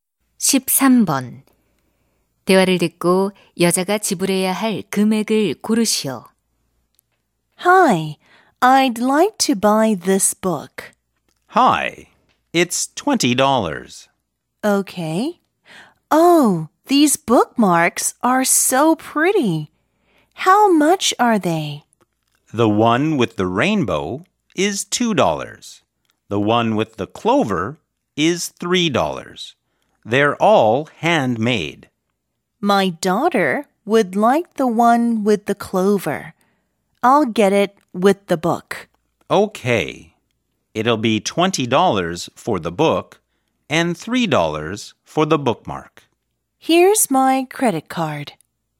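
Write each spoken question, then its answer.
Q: 대화를 듣고 여자가 지불해야 할 금액을 고르시오.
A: 23달러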